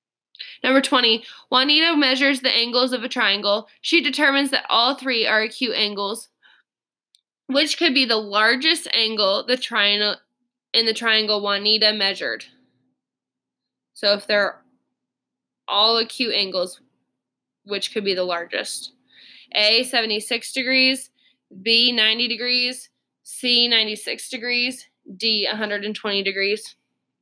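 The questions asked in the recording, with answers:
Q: So if they're all acute angles, which could be the largest?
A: A: 76 degrees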